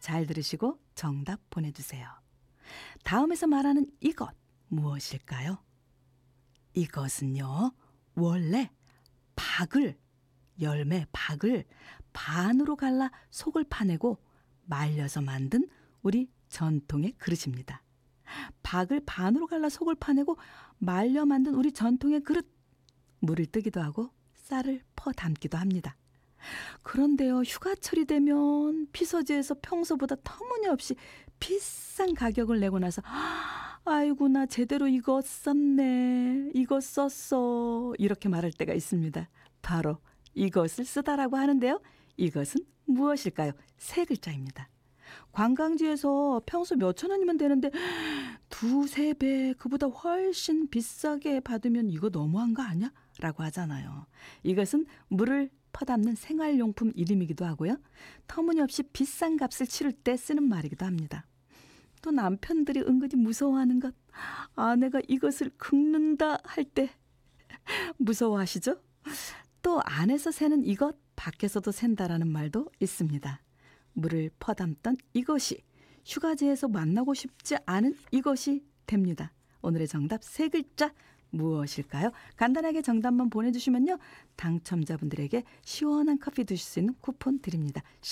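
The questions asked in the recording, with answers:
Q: 오늘의 정답 세 글자 무엇일까요?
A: 바가지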